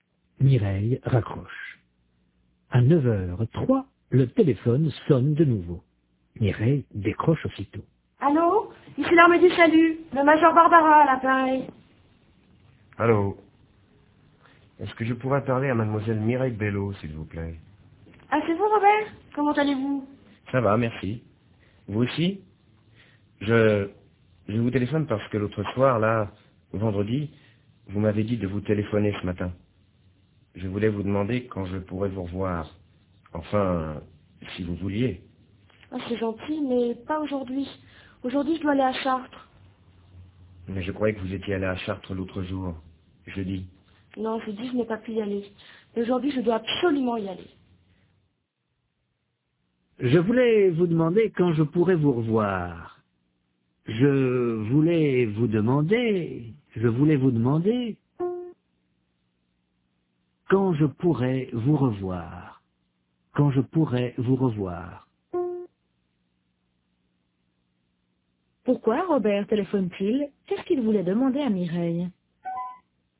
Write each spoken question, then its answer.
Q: Qu'est-ce qu'il voulait demander à Mireille?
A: Il voulait lui demander quand il pourrait la revoir.